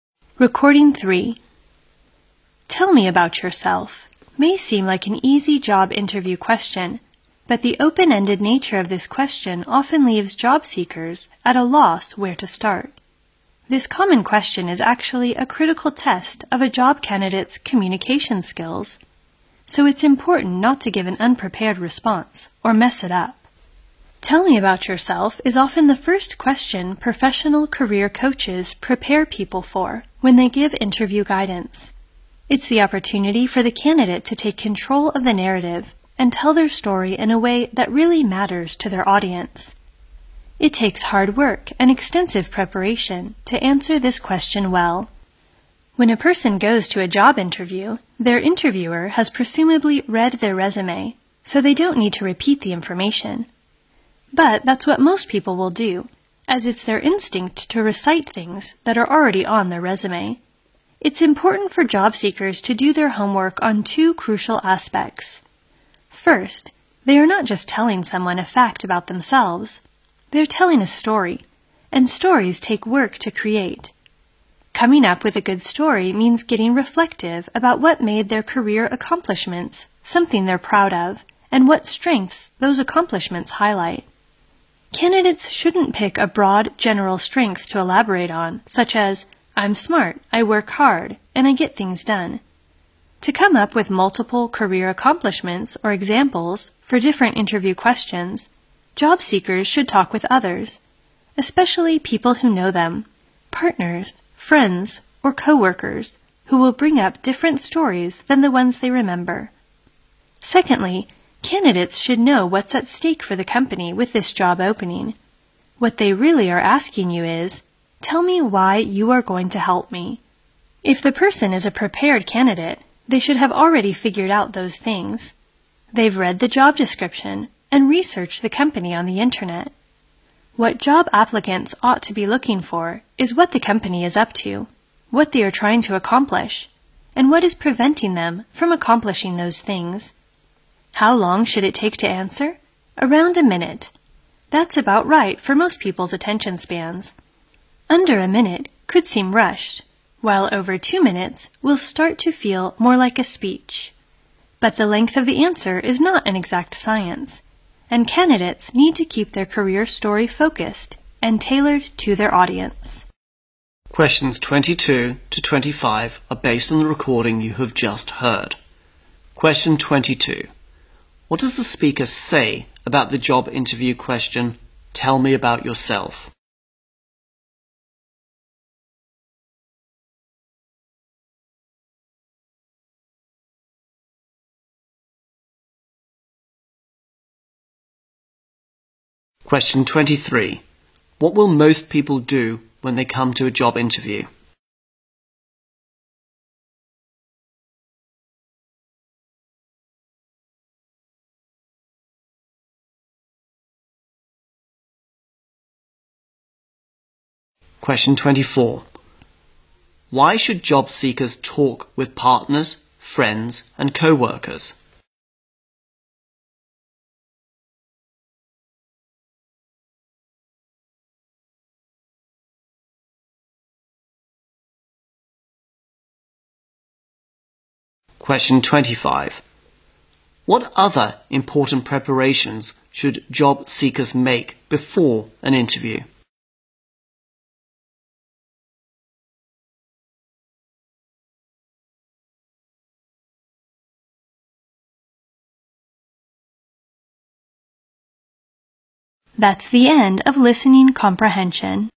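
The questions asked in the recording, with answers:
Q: What will most people do when they come to a job interview?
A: Repeat the information already on their resume

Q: Why should job seekers talk with partners, friends, and co-workers?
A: These people will bring up different stories about their accomplishments

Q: What other important preparations should job seekers make before an interview?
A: Find out what is at stake for the company with this job opening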